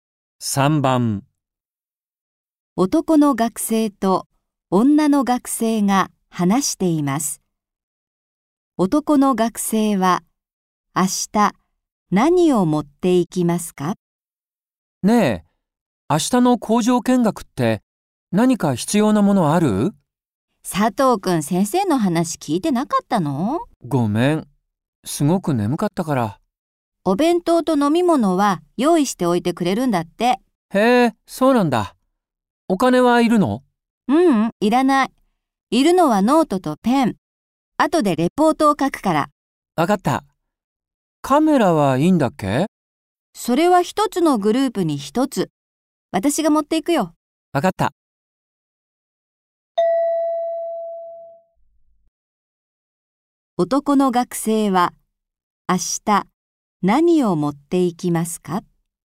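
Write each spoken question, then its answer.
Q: 男の学生は明日何を持っていきますか?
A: ノートとペン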